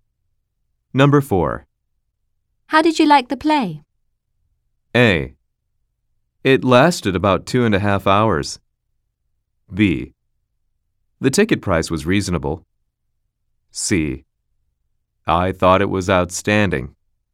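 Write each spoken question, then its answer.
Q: How did you like the play?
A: C: I thought it was outstanding.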